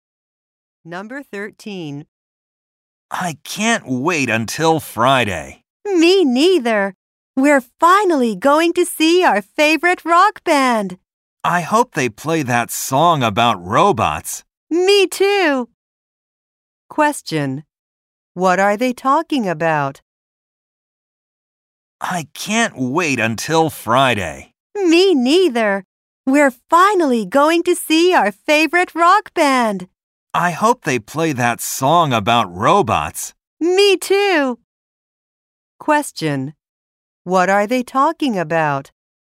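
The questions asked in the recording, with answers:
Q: What are they talking about?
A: A rock band they will see.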